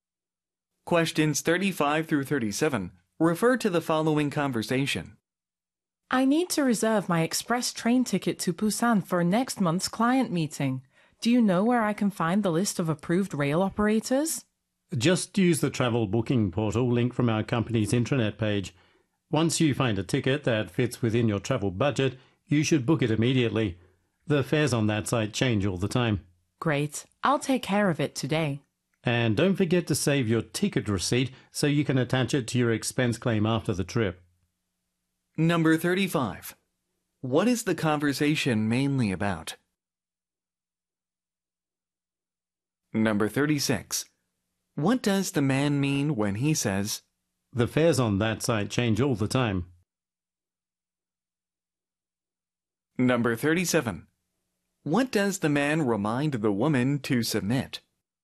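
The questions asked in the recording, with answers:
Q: What is the conversation mainly about?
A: Booking a train ticket for a business trip

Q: What does the man remind the woman to submit?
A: Her ticket receipt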